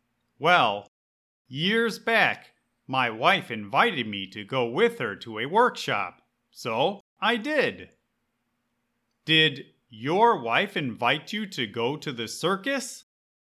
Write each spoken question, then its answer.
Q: Did your wife invite you to go to the circus?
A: No, my wife invited me to go to a workshop or a professional conference, not a circus.